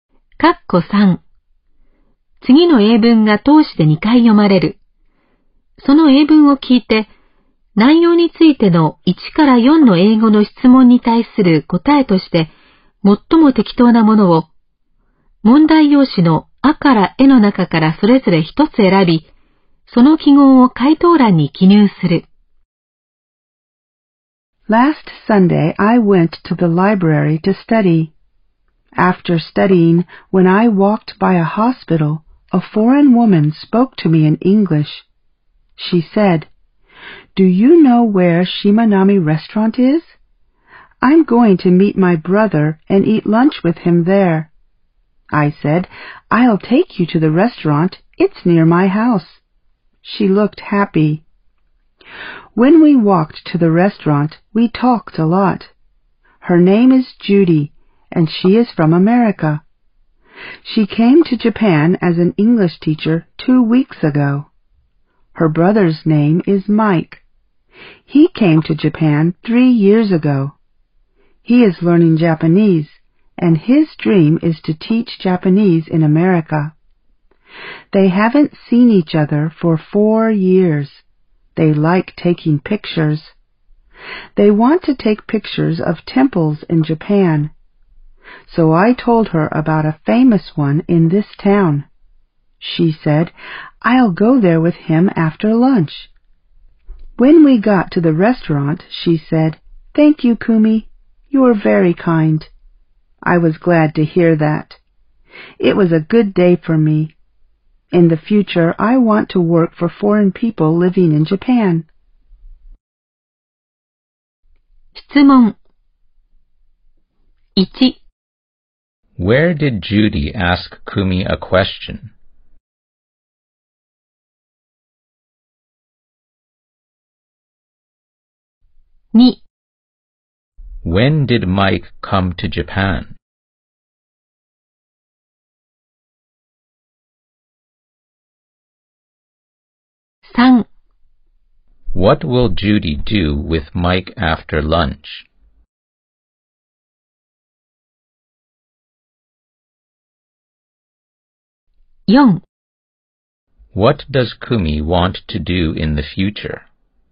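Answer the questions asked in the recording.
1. Near (when Kumi walked by) a hospital.
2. Three years ago.
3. Go to a famous temple in the town to take pictures.
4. Work for foreign people living in Japan.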